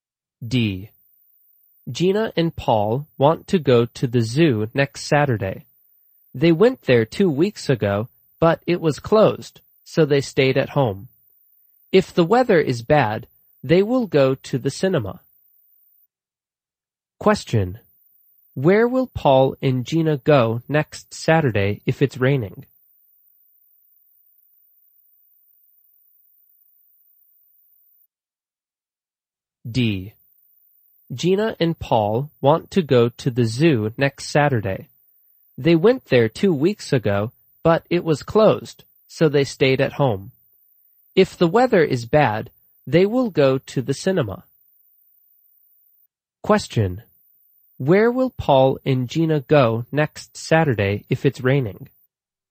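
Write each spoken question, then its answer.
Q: Where will Paul and Gina go next Saturday if it's raining?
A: To the cinema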